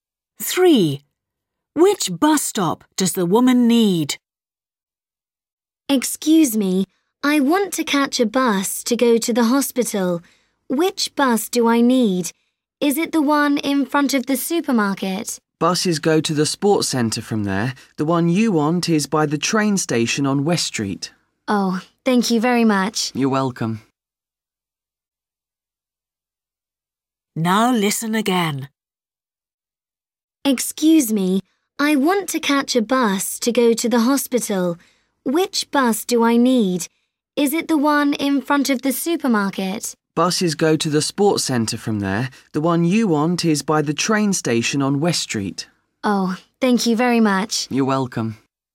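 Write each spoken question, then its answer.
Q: Which bus stop does the woman need?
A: The one by the train station on West Street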